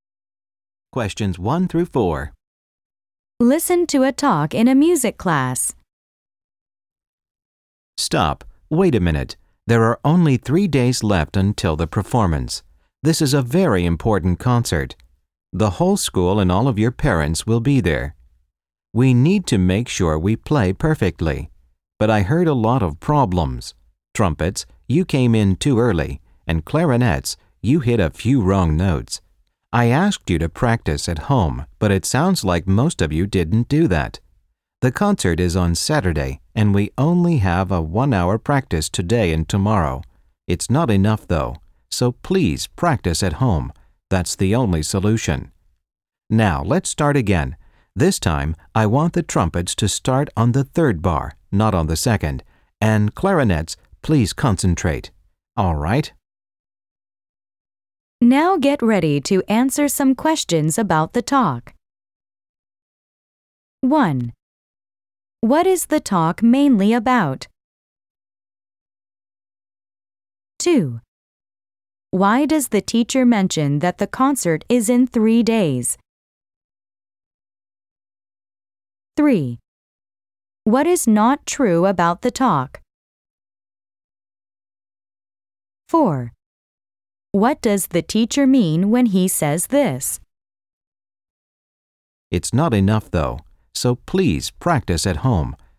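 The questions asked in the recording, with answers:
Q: What does the teacher mean when he says this?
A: The students must practice at home because class practice time is too short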